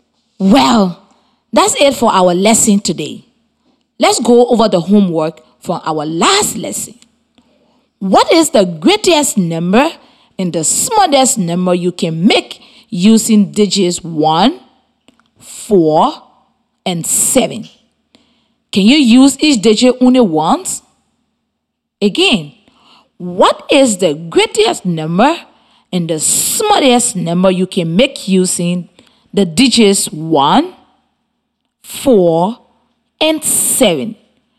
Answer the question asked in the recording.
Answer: The greatest number you can create with those three digits is 741.